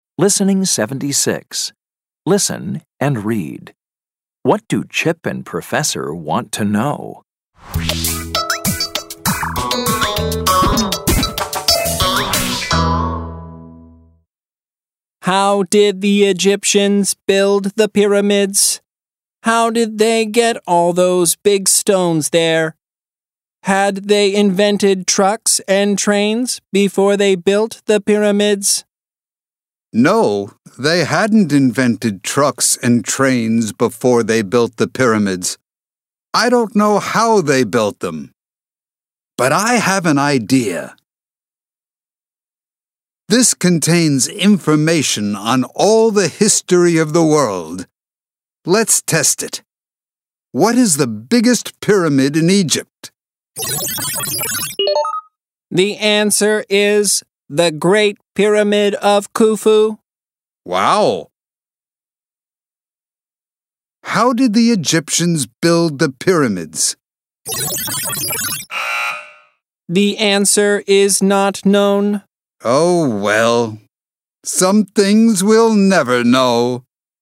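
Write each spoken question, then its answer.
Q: What do Chip and Professor want to know?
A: How the Egyptians built the pyramids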